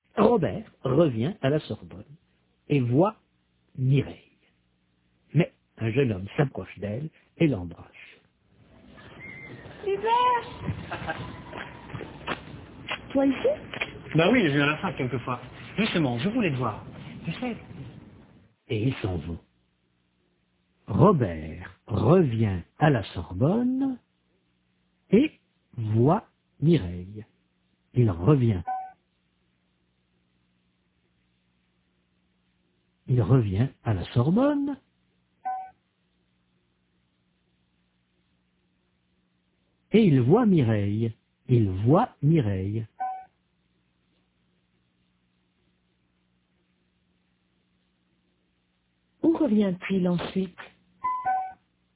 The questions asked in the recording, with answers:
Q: Où revient-il ensuite ?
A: À la Sorbonne.